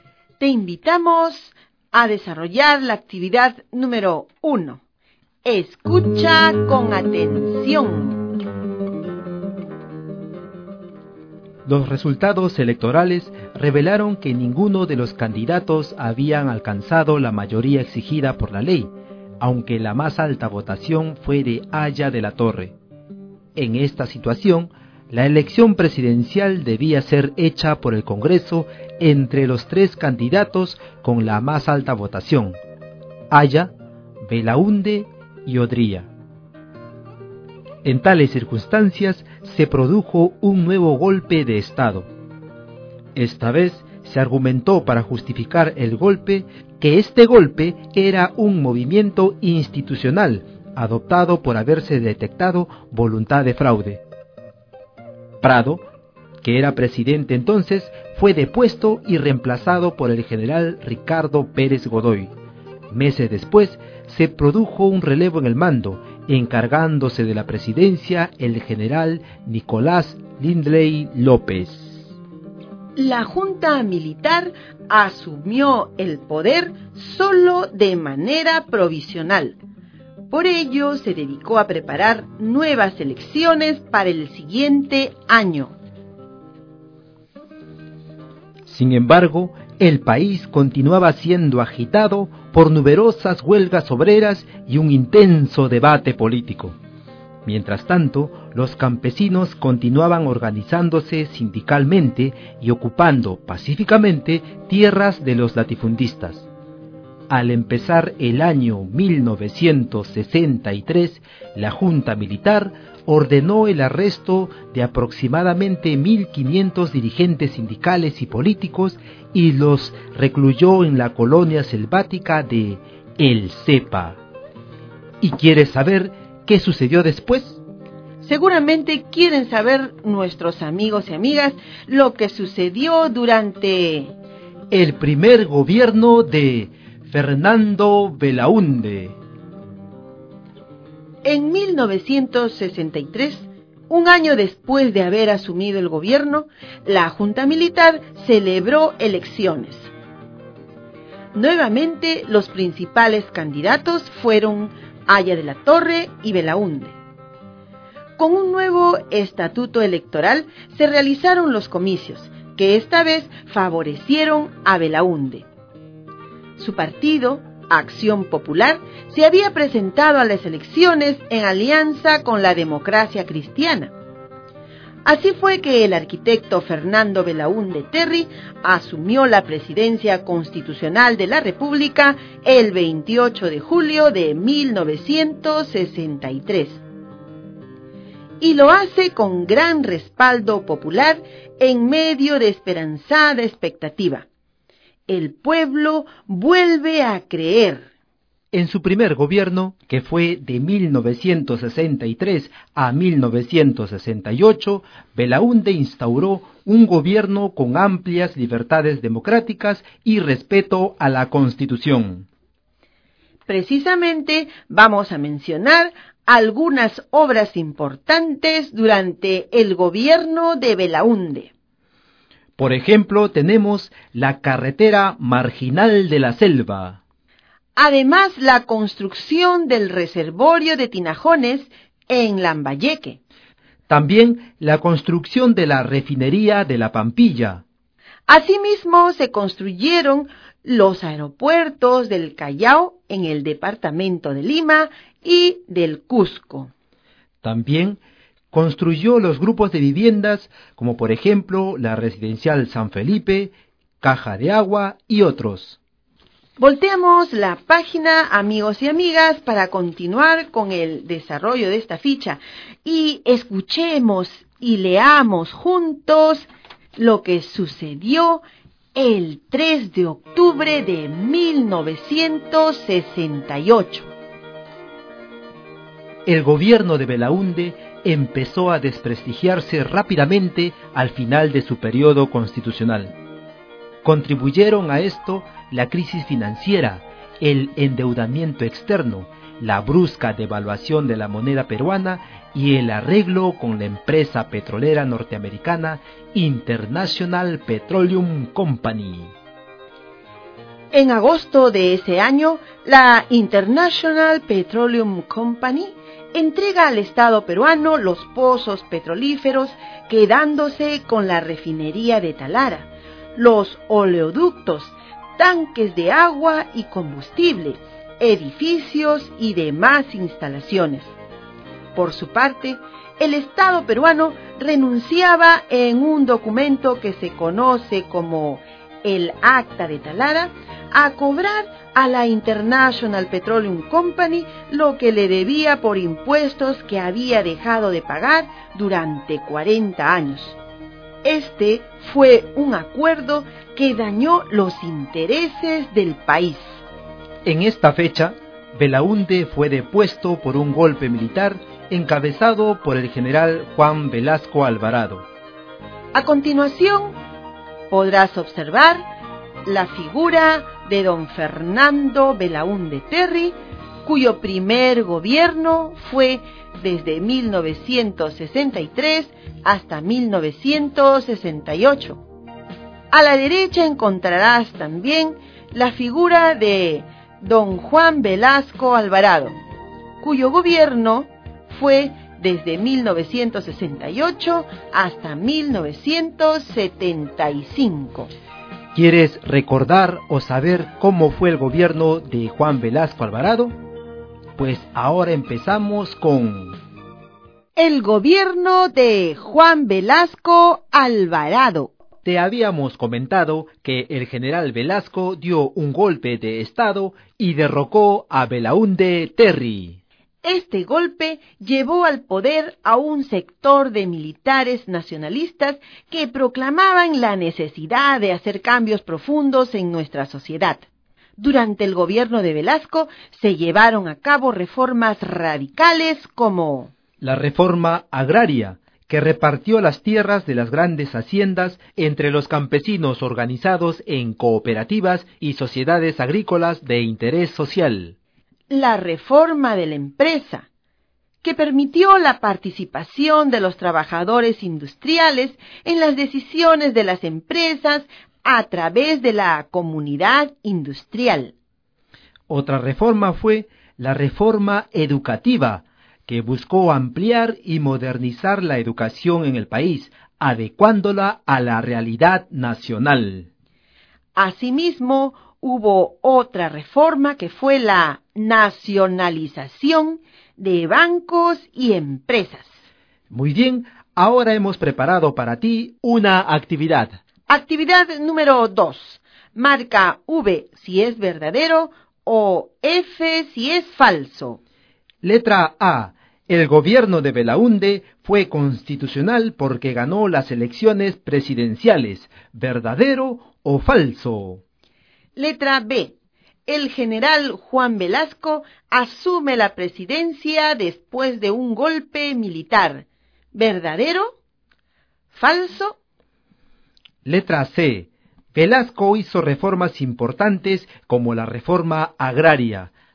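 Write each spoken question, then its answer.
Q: El gobierno de Belaunde fue constitucional porque ganó las elecciones presidenciales. ¿Verdadero o falso?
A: Verdadero

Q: El general Juan Velasco asume la presidencia después de un golpe militar. ¿Verdadero? ¿Falso?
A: Verdadero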